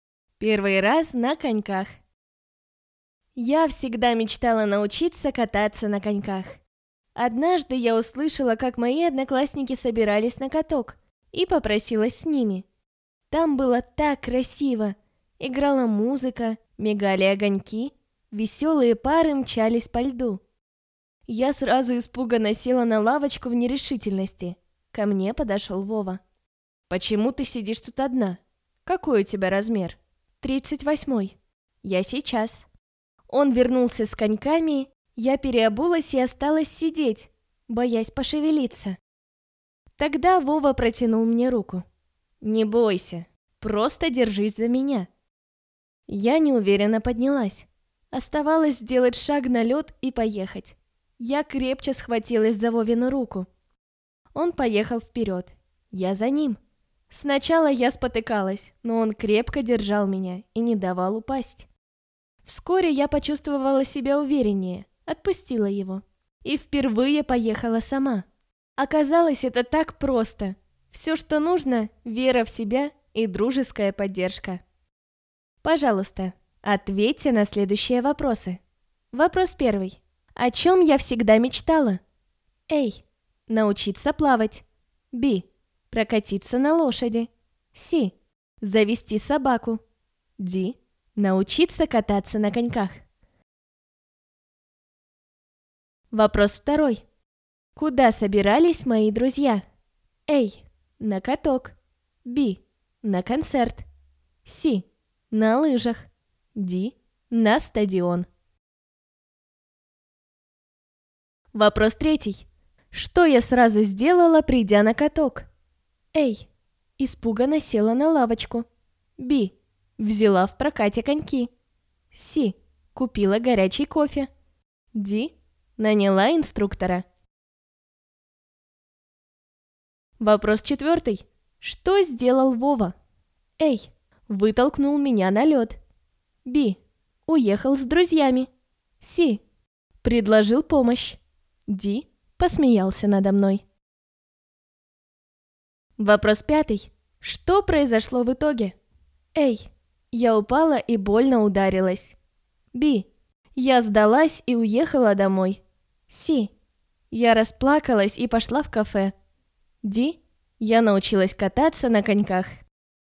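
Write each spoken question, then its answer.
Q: О чем я всегда мечтала?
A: Д: Научиться кататься на коньках

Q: Куда собирались мои друзья?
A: А: На каток

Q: Что я сразу сделала, придя на каток?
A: А: Испуганно села на лавочку

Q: Что сделал Вова?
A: С: Предложил помощь

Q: Что произошло в итоге?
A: Д: Я научилась кататься на коньках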